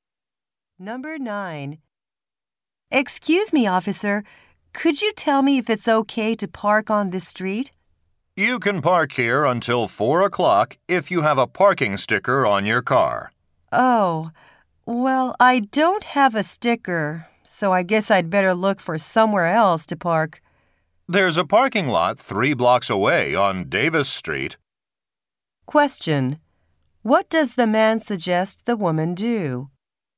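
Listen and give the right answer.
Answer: Park in the parking lot on Davis Street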